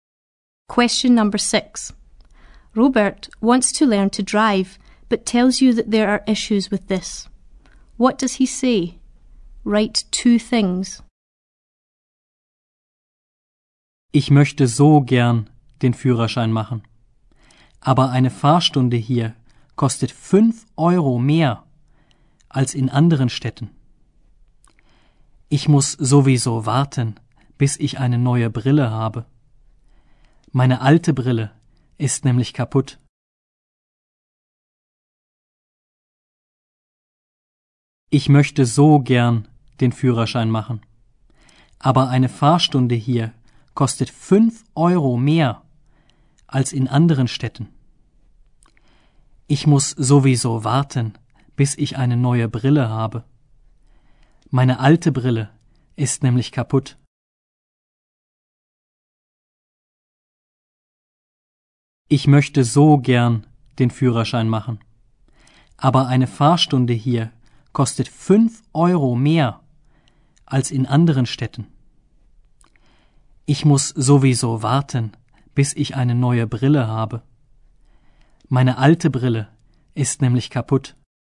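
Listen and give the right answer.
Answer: A driving lesson here costs 5 euros more than in other towns; he has to wait for new glasses because his old ones are broken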